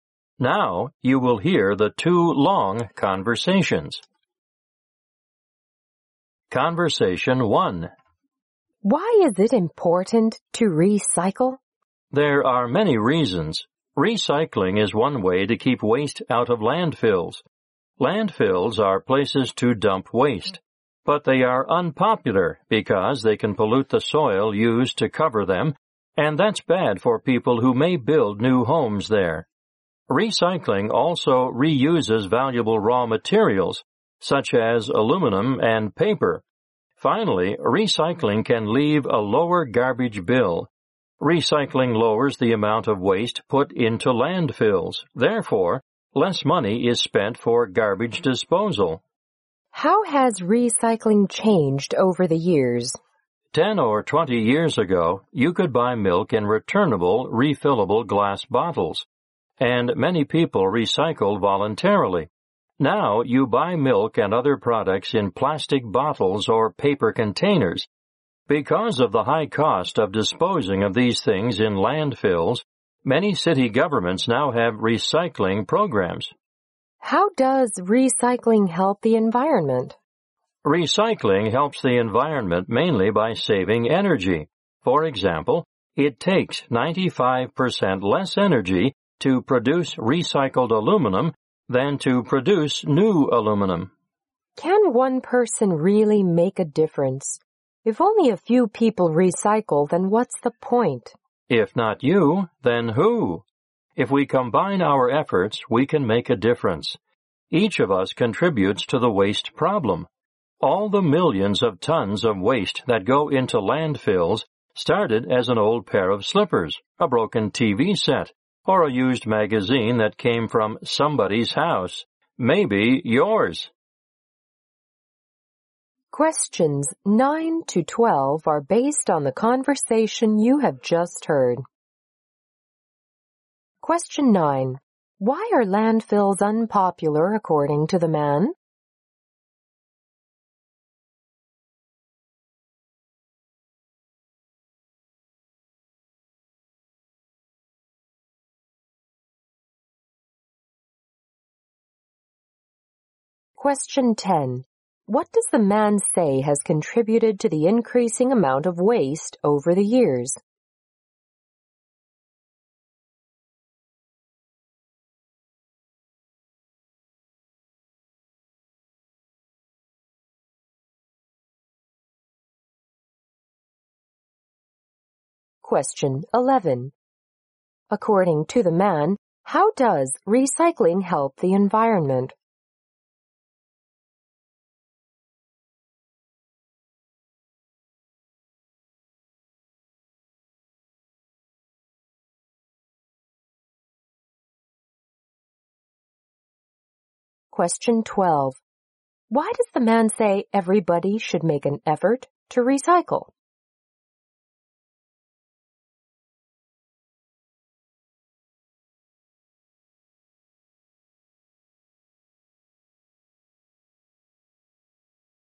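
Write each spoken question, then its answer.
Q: Why are landfills unpopular according to the man?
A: They can pollute the soil used to cover them.

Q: What does the man say has contributed to the increasing amount of waste over the years?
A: Products now come in plastic bottles or paper containers instead of refillable glass bottles.

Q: According to the man, how does recycling help the environment?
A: Mainly by saving energy.

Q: Why does the man say everybody should make an effort to recycle?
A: Everyone contributes to the waste problem, and together we can make a difference.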